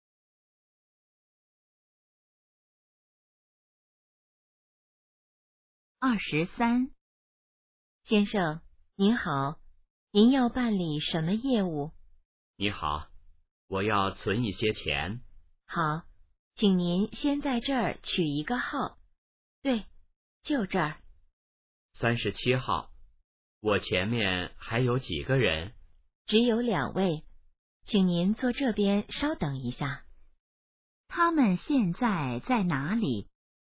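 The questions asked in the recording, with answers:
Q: 他们现在在哪里?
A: 银行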